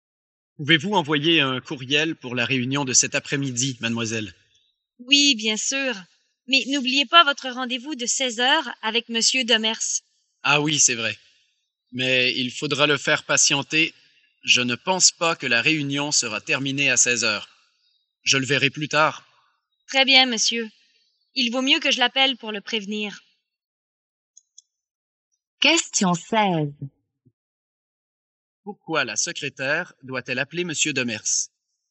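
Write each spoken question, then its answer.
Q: Pourquoi la secrétaire doit-elle appeler Monsieur Demers?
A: Pour le prévenir que son patron sera en retard au rendez-vous de 16h, car la réunion ne sera pas terminée.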